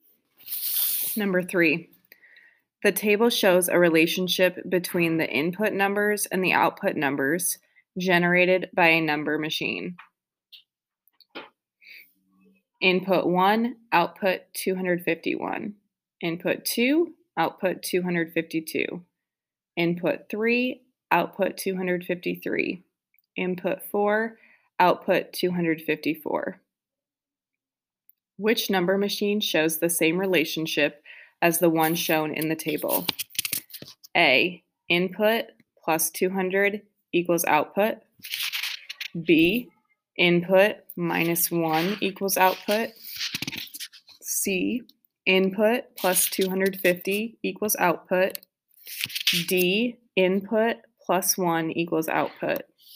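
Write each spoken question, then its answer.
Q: Which number machine shows the same relationship as the one shown in the table?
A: C: input plus 250 equals output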